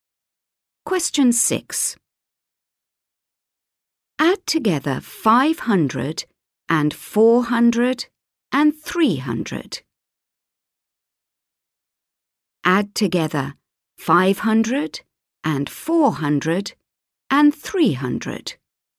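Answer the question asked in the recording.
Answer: 1200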